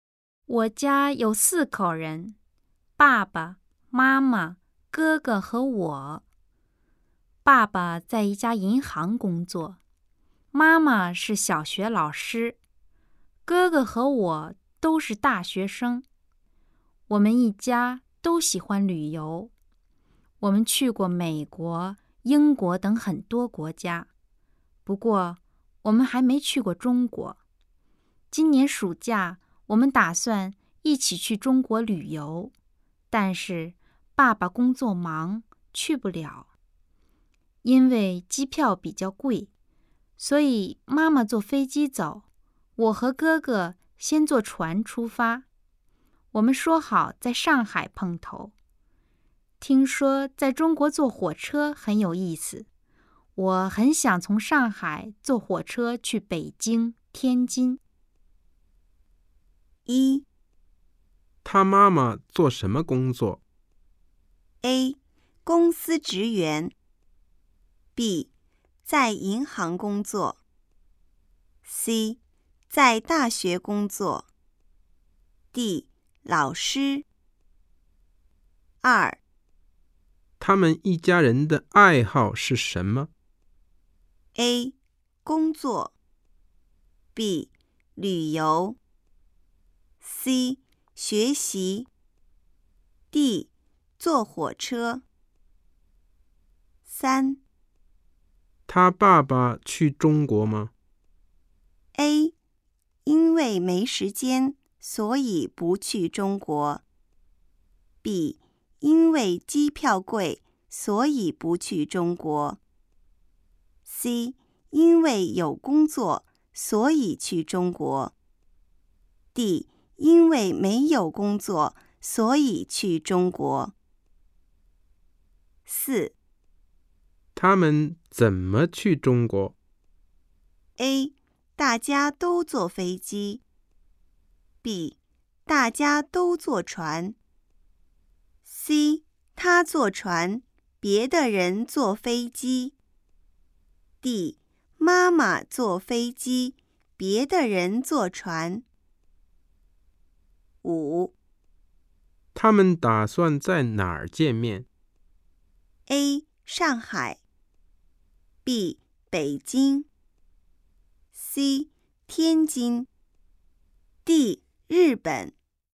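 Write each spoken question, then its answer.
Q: 他妈妈做什么工作?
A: D: 老师

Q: 他们一家人的爱好是什么?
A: B: 旅游

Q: 他爸爸去中国吗?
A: A: 因为没时间,所以不去中国。

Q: 他们怎么去中国?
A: D: 妈妈坐飞机,别的人坐船

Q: 他们打算在哪儿见面?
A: A: 上海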